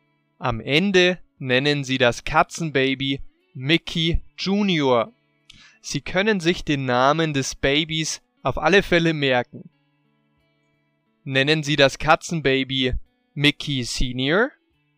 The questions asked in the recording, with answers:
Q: Nennen Sie das Katzenbaby Mickey Senior?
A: Nein, Sie nennen das Katzenbaby nicht Mickey Senior, sondern Sie nennen es Mickey Junior.